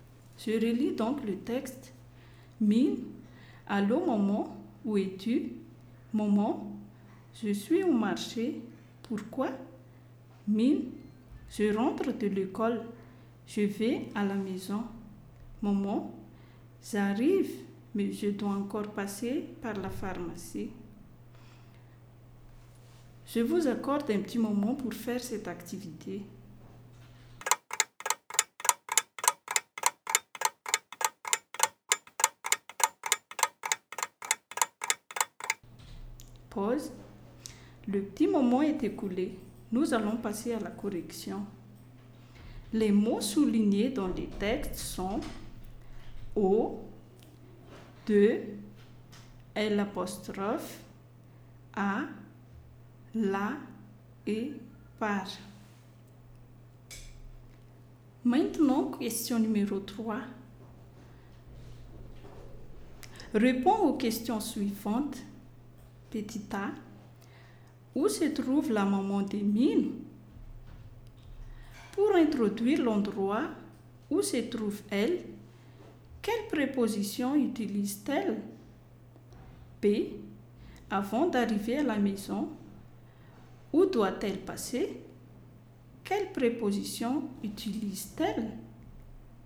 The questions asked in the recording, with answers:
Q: où se trouve la maman des mines?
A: La maman de mine se trouve au marché.

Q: Pour introduire l'endroit où se trouve elle, quelle préposition utilise-t-elle?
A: Elle utilise la préposition « au » là devant un nom masculin.

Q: Quelle préposition utilise-t-elle?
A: elle utilise la préposition par.